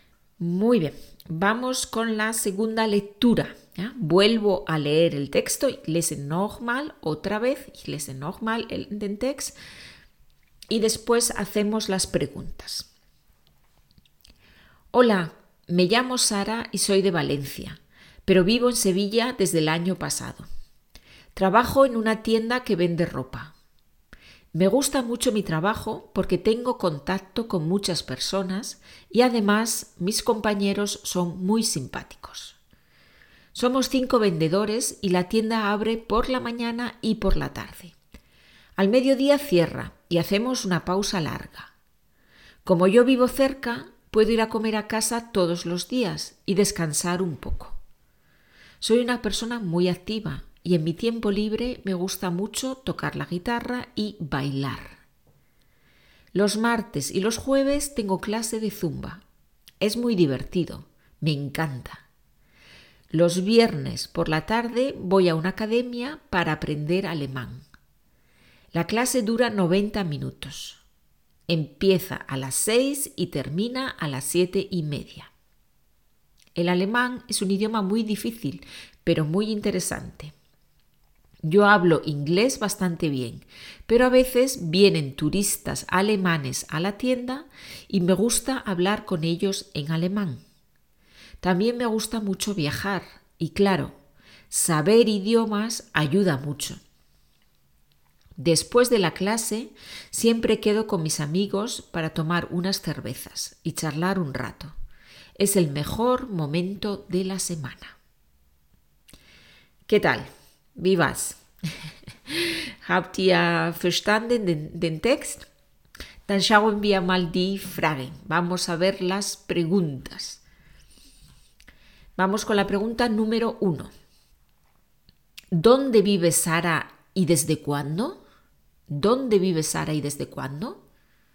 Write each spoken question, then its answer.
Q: ¿Dónde vive Sara y desde cuándo?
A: Sara vive en Sevilla desde el año pasado.